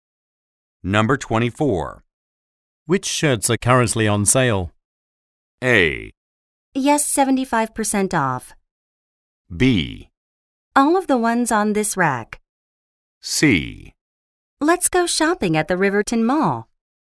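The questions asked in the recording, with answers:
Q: Which shirts are currently on sale?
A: B: All of the ones on this rack.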